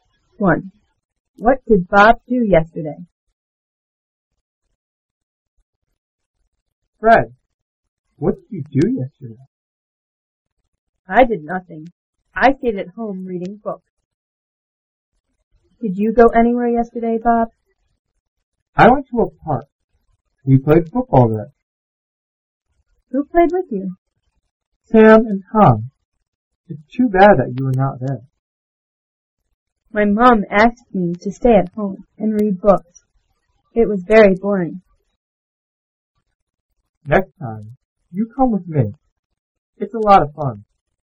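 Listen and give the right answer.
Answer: He went to a park and played football.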